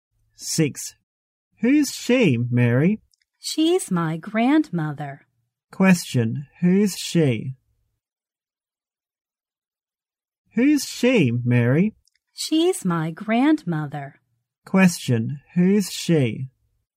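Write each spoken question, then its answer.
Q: who's she?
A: Mary's grandmother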